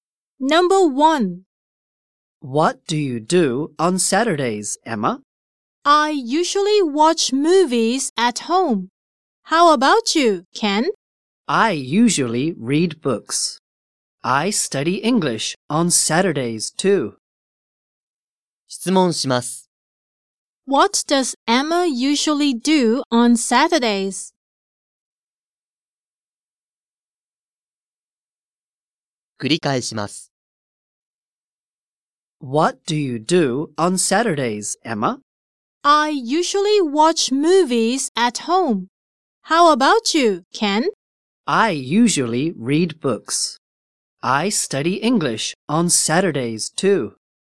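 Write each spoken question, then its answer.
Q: What does Emma usually do on Saturdays?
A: She usually watches movies at home.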